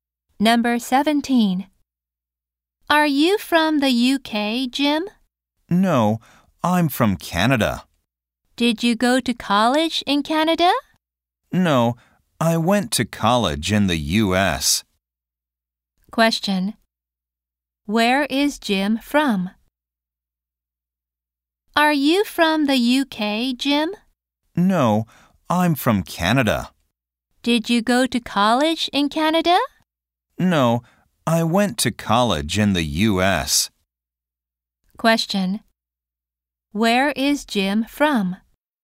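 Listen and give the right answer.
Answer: Canada.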